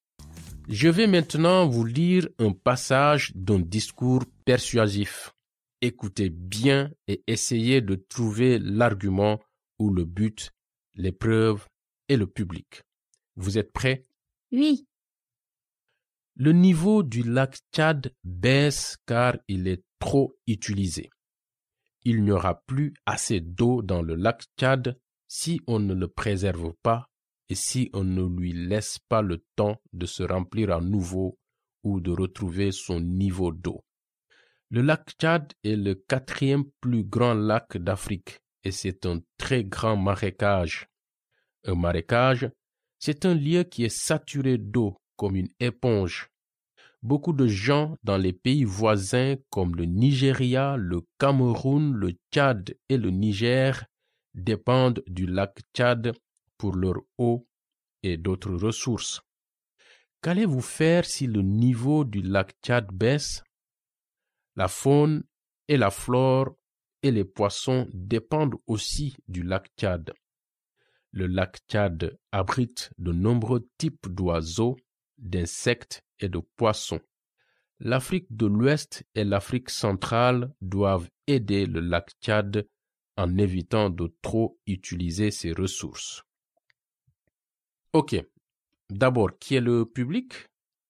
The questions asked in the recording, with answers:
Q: Ok, d'abord, qui est le public?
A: Les habitants d'Afrique de l'Ouest et d'Afrique centrale?